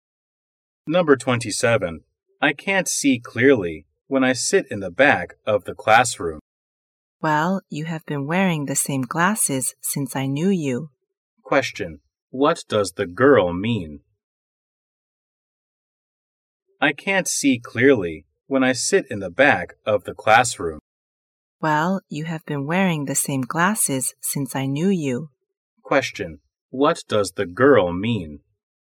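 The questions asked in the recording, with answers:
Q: What does the girl mean?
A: He should get new glasses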